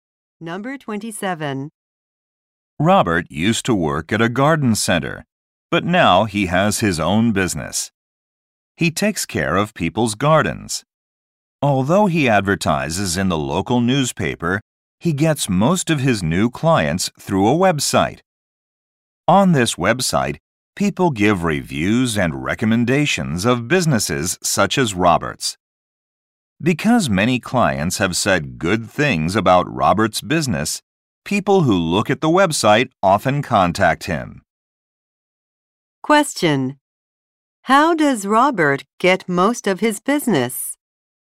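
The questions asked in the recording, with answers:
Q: How does Robert get most of his business?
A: Through a review website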